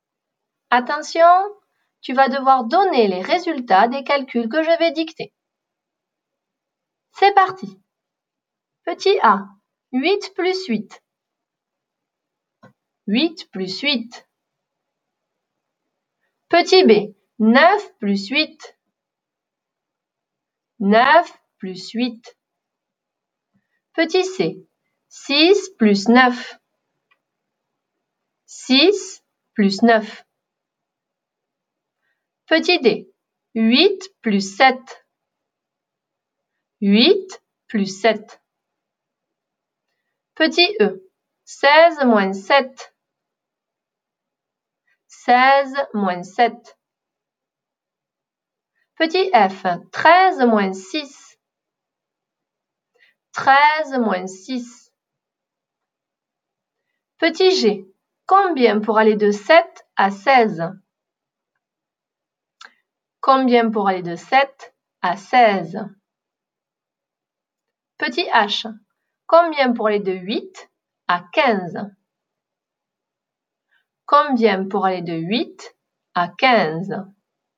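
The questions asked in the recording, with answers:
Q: 8 plus 8.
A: 16

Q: 9 plus 8.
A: 17

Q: 6 plus 9.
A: 15

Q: 8 plus 7.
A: 15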